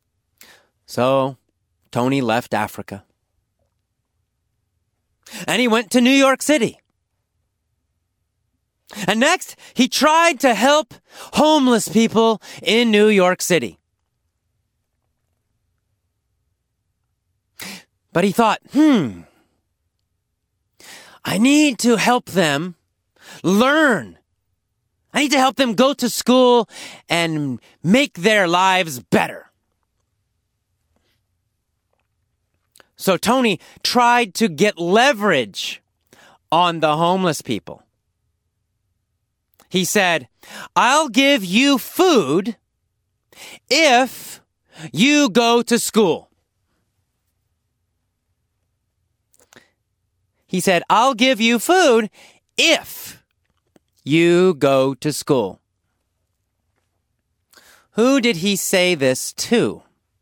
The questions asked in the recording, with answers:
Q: Who did he say this to?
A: He said it to homeless people in New York City.